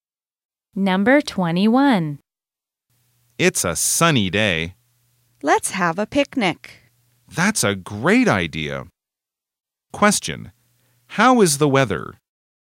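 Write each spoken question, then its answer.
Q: How is the weather?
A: It's sunny.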